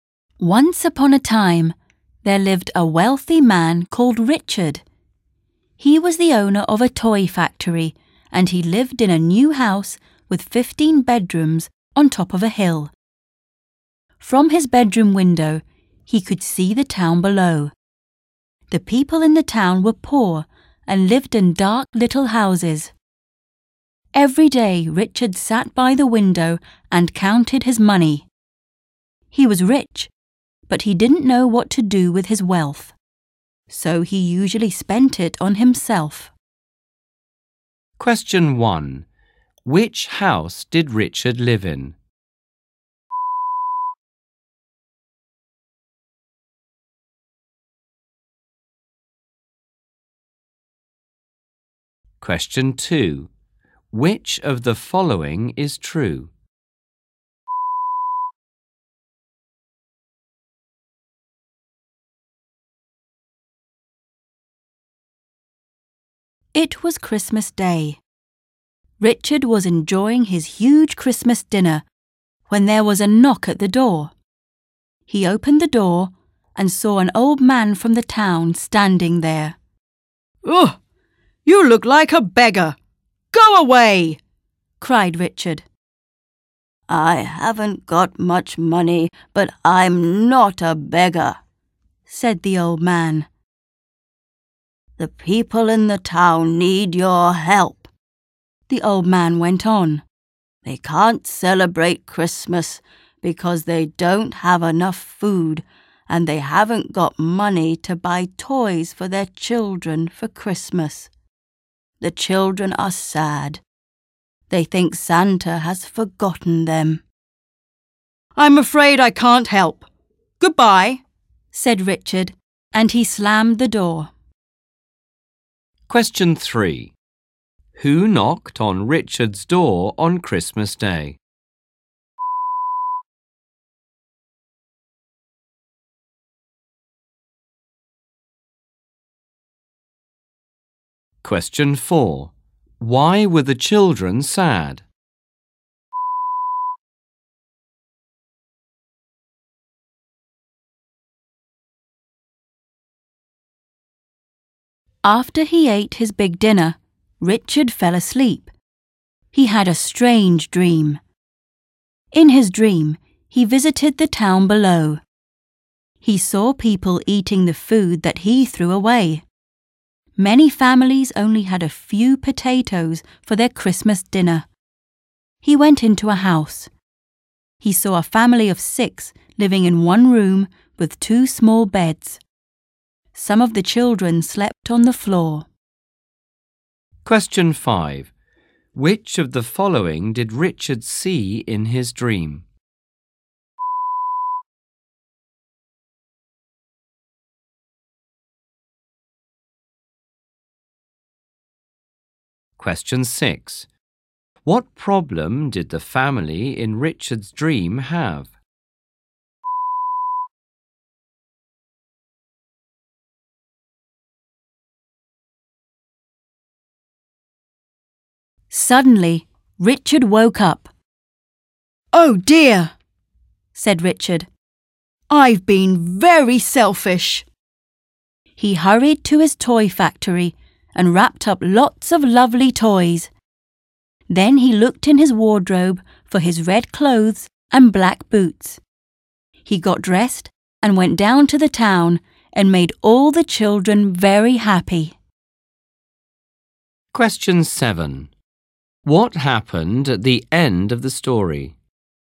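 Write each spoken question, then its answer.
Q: Which house did Richard live in?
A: A new house with 15 bedrooms on top of a hill

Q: Who knocked on Richard's door on Christmas Day?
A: An old man from the town

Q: Why were the children sad?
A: They thought Santa had forgotten them

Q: What problem did the family in Richard's dream have?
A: Six people lived in one room with only two small beds

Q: What happened at the end of the story?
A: Richard dressed as Santa and gave toys to the town's children, making them happy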